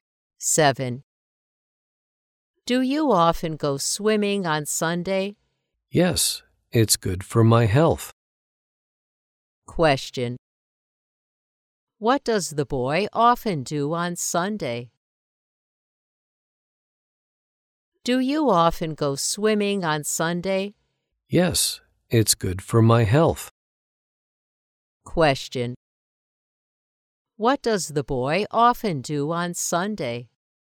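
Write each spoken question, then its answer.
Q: What does the boy often do on Sunday?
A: He goes swimming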